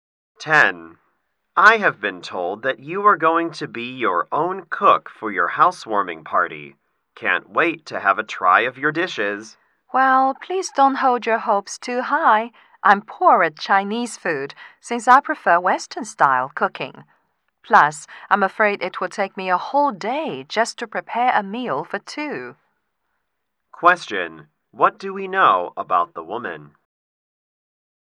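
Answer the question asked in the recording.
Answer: She is not a good cook, especially of Chinese food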